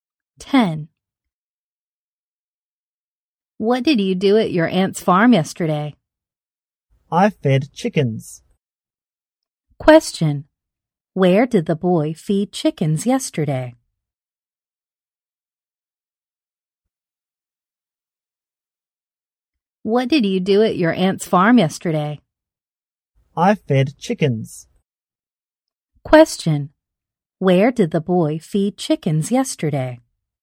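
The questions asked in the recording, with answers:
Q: Where did the boy feed chickens yesterday?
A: At his aunt's farm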